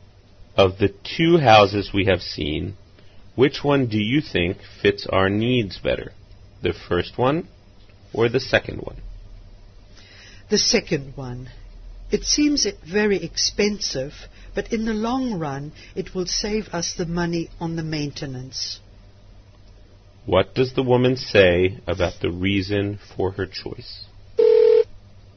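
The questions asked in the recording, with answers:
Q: What does the woman say about the reason for her choice?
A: The second house will save money on maintenance in the long run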